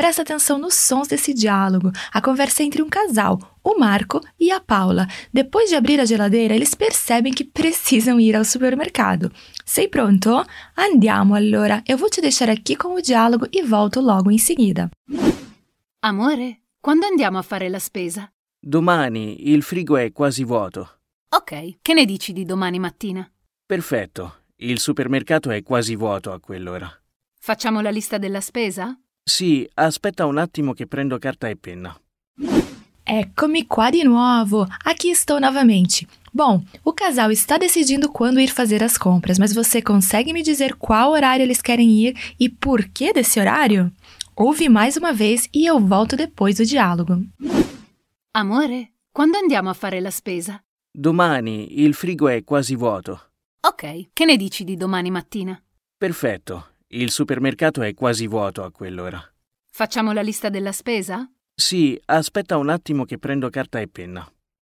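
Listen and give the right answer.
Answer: Amanhã de manhã, porque o supermercado está quase vazio nesse horário.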